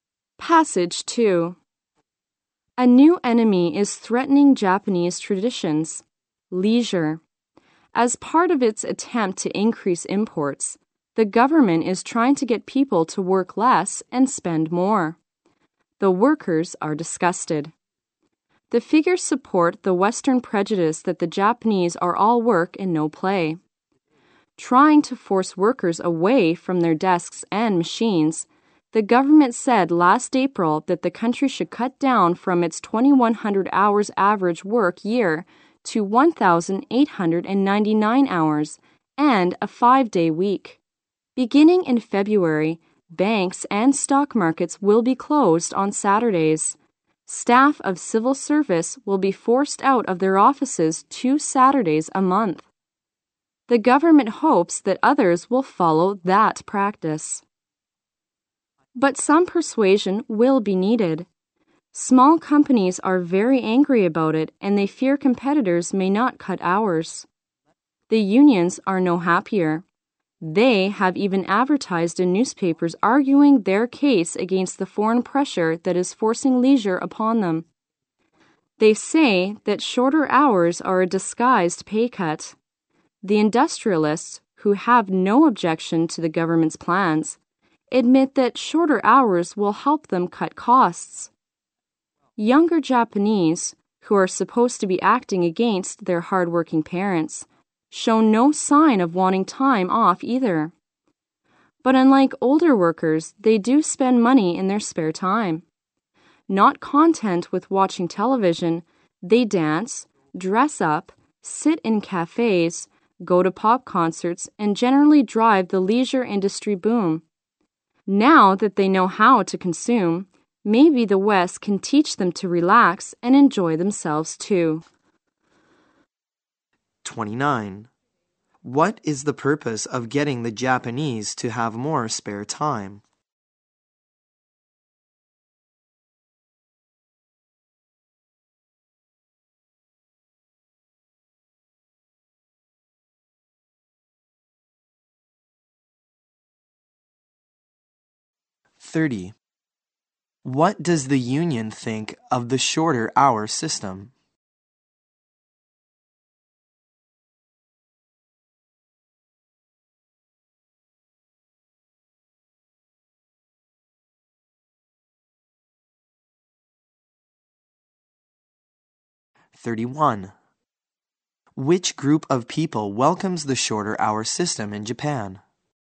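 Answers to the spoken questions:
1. To increase imports by getting people to spend more
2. It is a disguised pay cut
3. The industrialists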